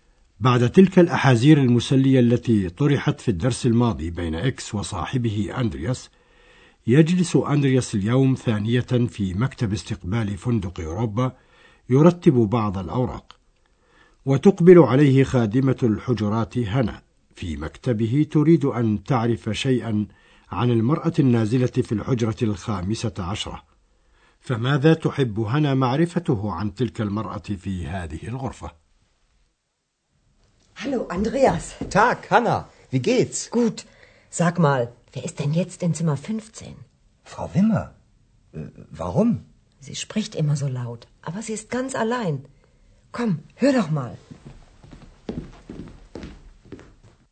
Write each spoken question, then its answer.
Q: فماذا تحب هنا معرفته عن تلك المرأة في هذه الغرفة؟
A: تود هنا أن تعرف من هو الذي ينزل في الحجرة 15، حيث لفت نظرها أن المرأة النازلة هناك تتكلم دائما بصوت عال.